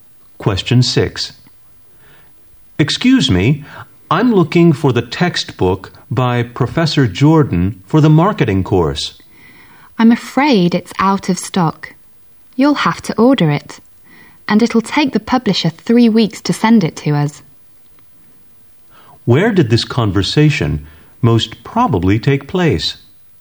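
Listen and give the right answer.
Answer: In a bookstore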